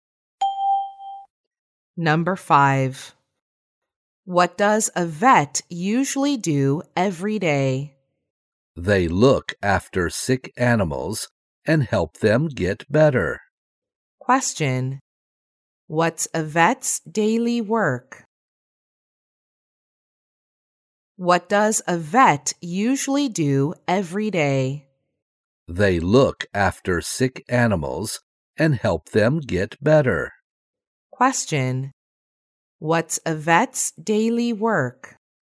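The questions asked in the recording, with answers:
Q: What's a vet's daily work?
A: Looking after sick animals and helping them get better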